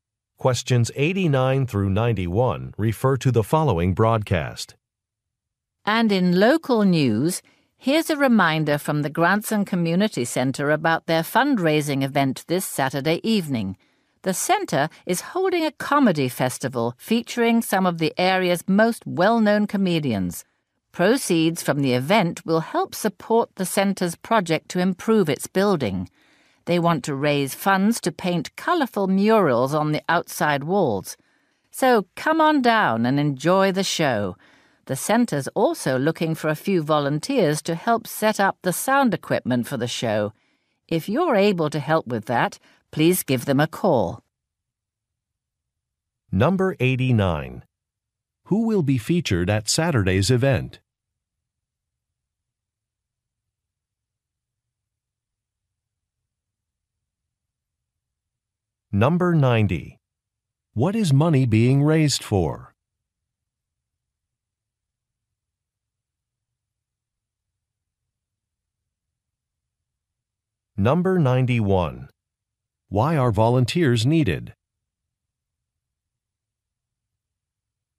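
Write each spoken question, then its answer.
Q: Who will be featured at Saturday's event?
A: Local comedians

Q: What is money being raised for?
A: To paint murals on the center's outside walls

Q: Why are volunteers needed?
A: To set up sound equipment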